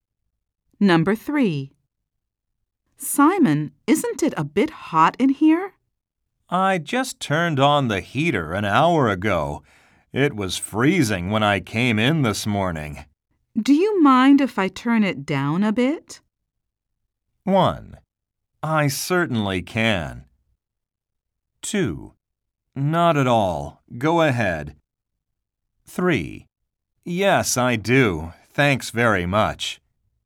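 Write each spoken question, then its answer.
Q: Do you mind if I turn it down a bit?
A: 2: Not at all. Go ahead.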